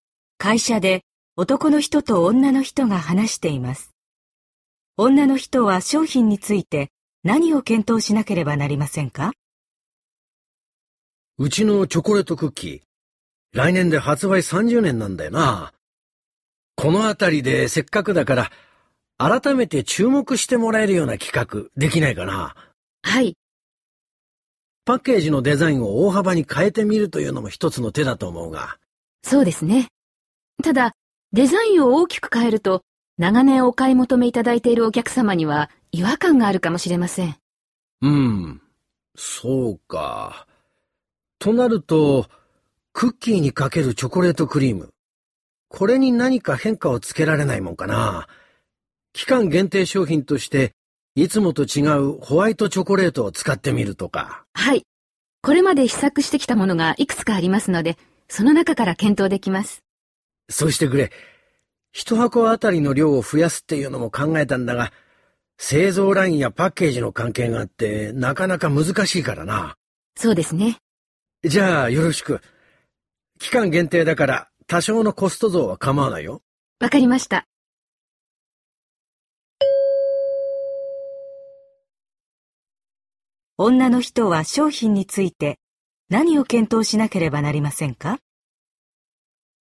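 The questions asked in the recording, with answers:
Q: 女の人は商品について何を検討しなければなりませんか?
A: クッキーにかけるチョコレートクリームの種類(期間限定のホワイトチョコレートなど)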